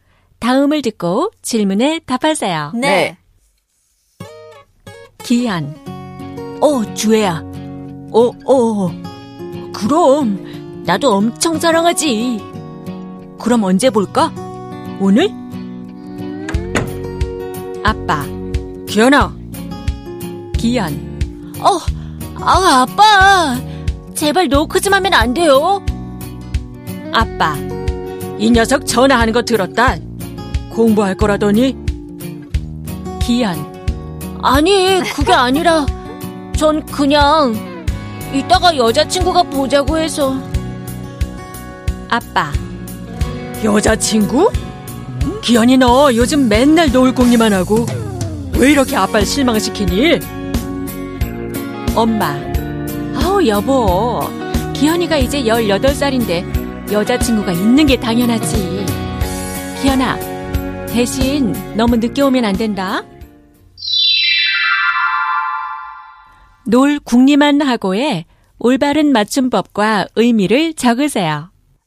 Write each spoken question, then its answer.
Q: 놀 궁리만 하고의 올바른 맞춤법과 의미를 적으세요.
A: You're always thinking of ways to waste time, hang out with others, play.